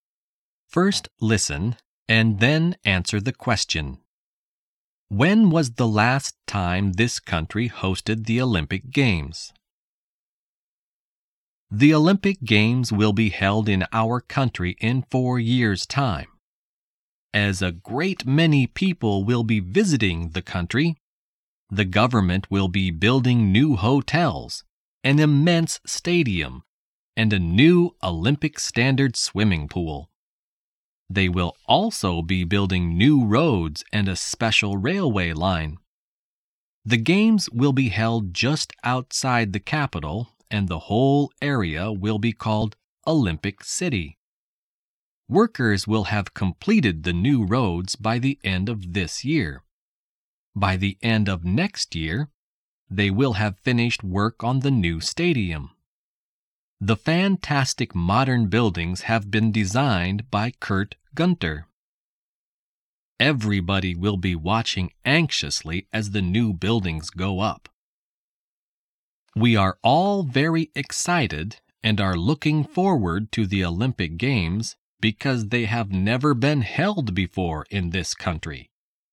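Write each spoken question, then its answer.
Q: When was the last time this country hosted the Olympic Games?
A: Never; the Olympic Games have never been held in this country before.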